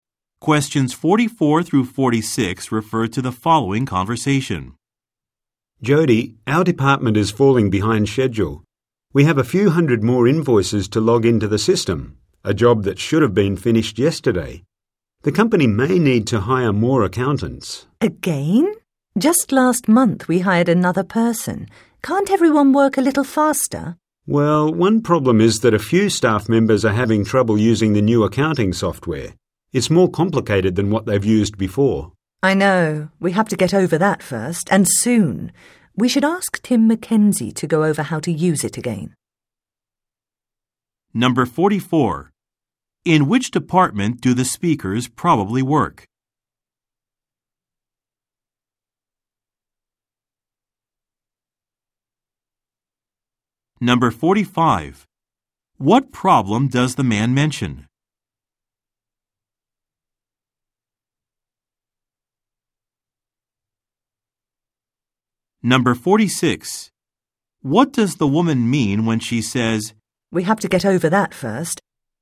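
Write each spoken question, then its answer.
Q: In which department do the speakers probably work?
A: Accounting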